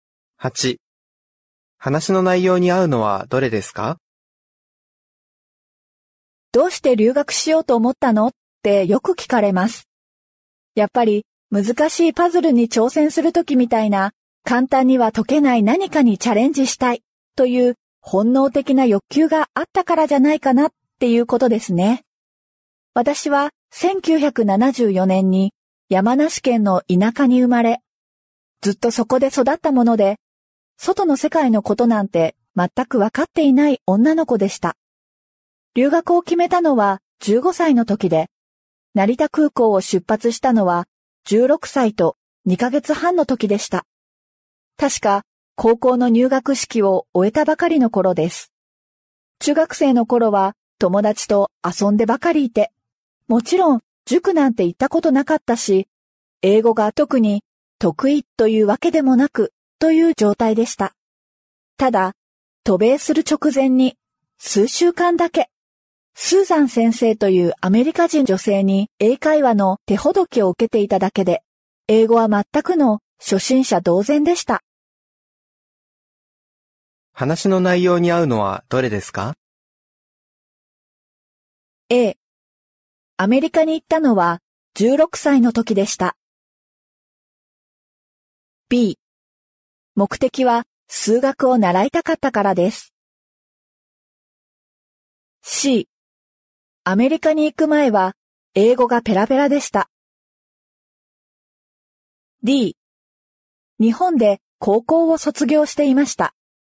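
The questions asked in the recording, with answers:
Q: 話の内容に合うのはどれですか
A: A: アメリカに行ったのは16歳の時でした。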